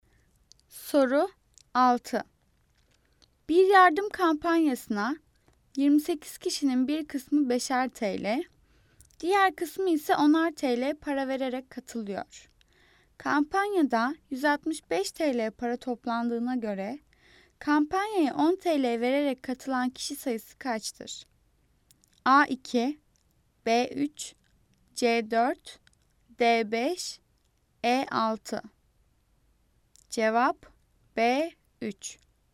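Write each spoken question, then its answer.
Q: Kampanyada 165 TL para toplandığına göre kampanyaya 10 TL vererek katılan kişi sayısı kaçtır?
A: D: 5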